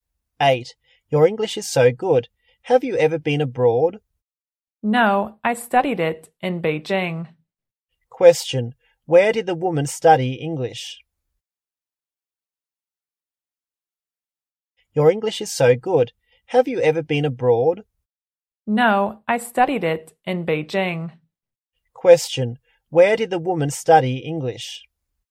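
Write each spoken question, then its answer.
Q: Where did the woman study English?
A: In Beijing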